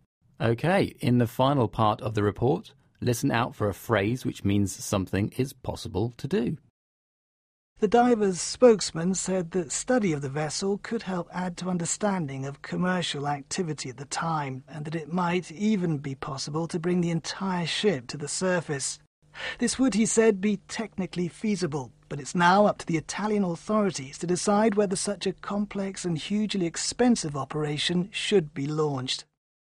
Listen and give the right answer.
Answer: that phrase was technically feasible.